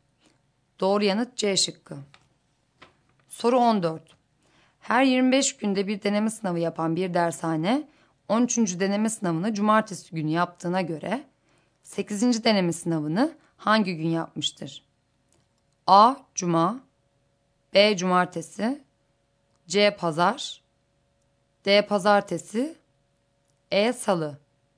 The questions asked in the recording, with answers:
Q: deneme sınavını hangi gün yapmıştır?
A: Doğru yanıt C şıkkı.